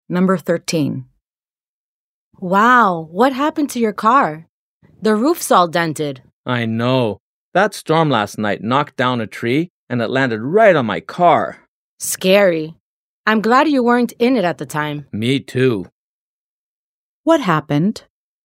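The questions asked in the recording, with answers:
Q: What happened?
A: During last night's storm, a tree fell onto the car and dented its roof.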